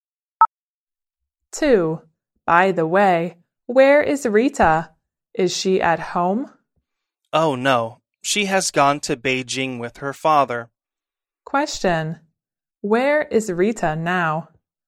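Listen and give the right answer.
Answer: In Beijing.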